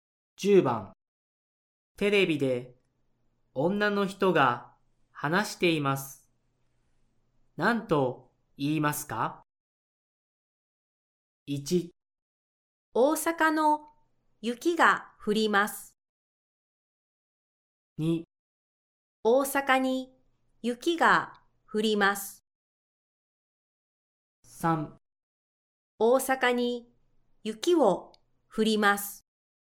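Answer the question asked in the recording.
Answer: 2: 大阪に雪が降ります。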